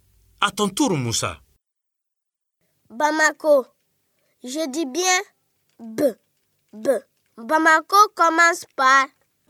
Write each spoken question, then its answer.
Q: Bamako commence par...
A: Bravo les élèves. Bamako commence par B.